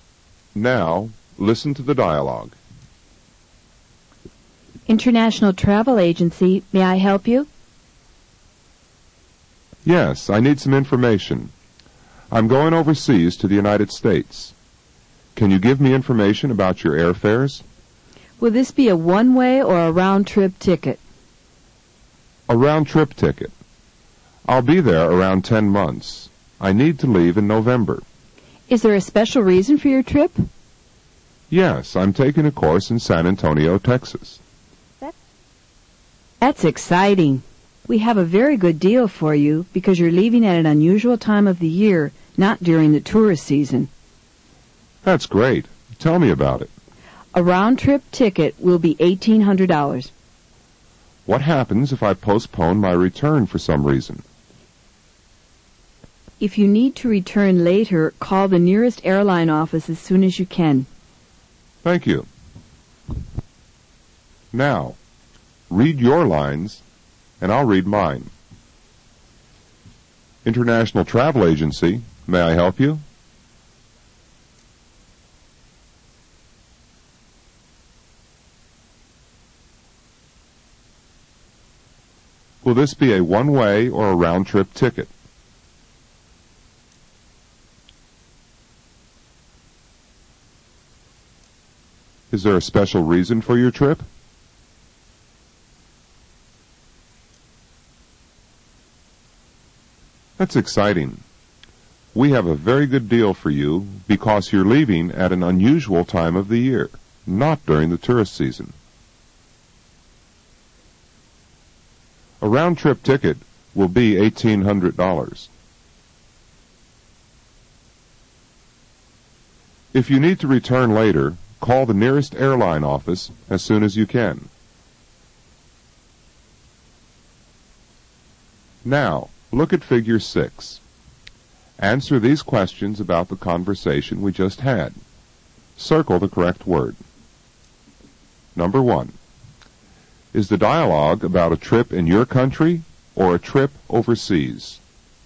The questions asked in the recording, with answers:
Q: Is the dialogue about a trip in your country or a trip overseas?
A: It's about a trip overseas.